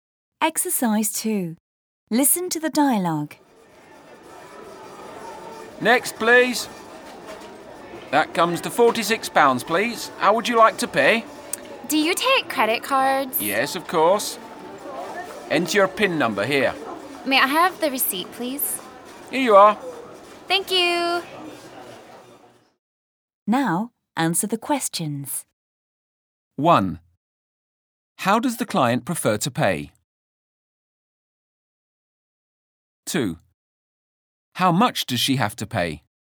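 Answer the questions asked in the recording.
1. By credit card
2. £46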